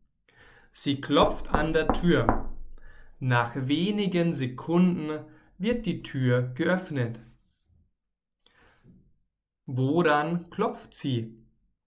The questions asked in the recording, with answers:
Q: Woran klopft sie?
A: An der Tür. Miriam klopft an der Tür.